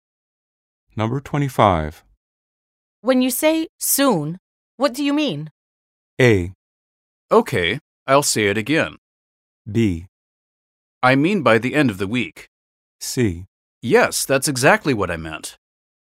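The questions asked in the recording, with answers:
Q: When you say soon, what do you mean?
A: B: I mean by the end of the week.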